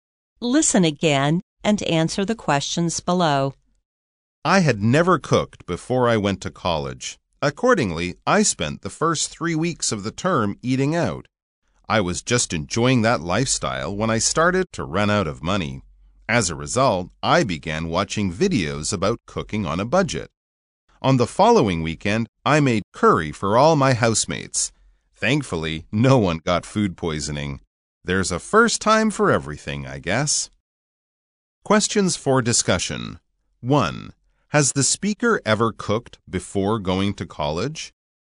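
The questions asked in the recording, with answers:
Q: Has the speaker ever cooked before going to college?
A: No, the speaker had never cooked before going to college.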